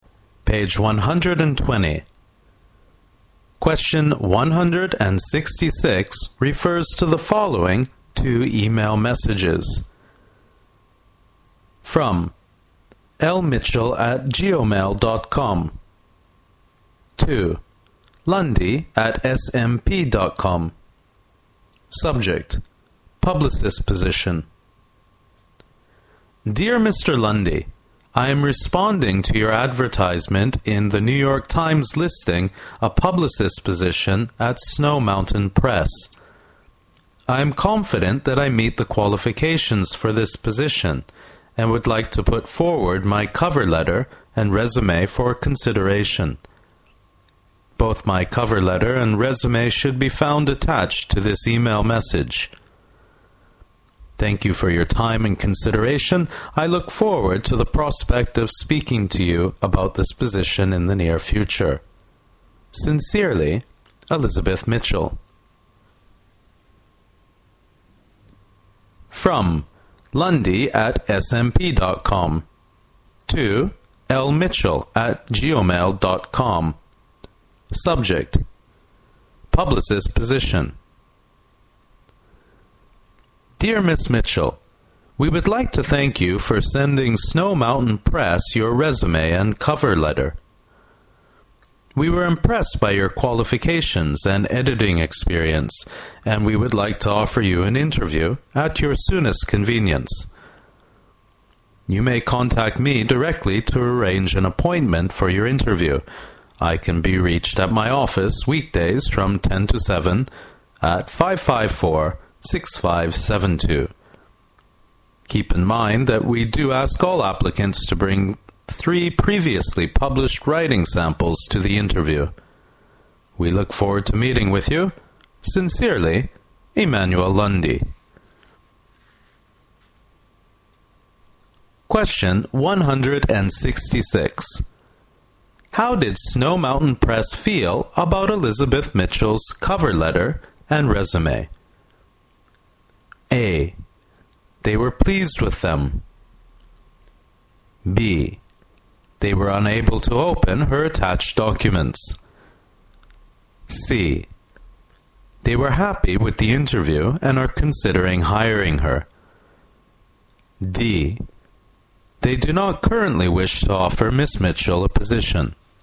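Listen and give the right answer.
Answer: A: They were pleased with them.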